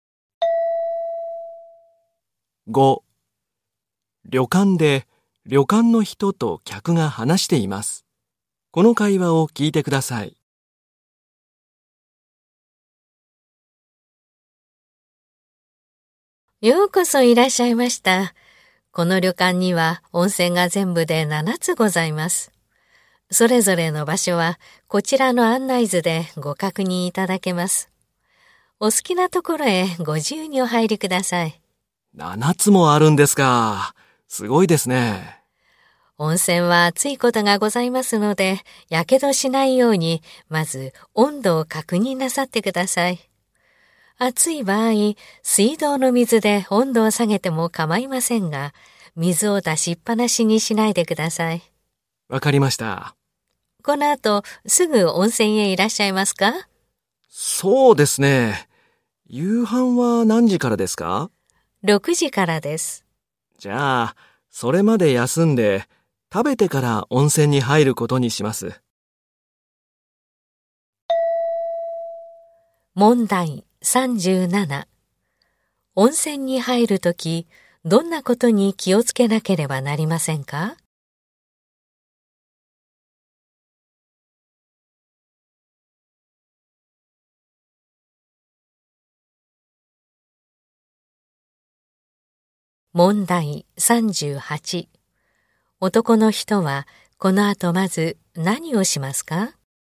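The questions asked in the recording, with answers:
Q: 男の人はこの後まず何をしますか?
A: 休む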